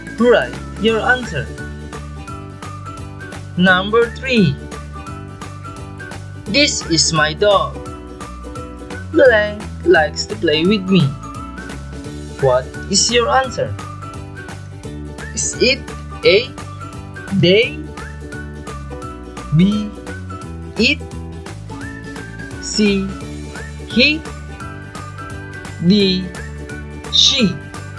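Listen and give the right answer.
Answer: B: It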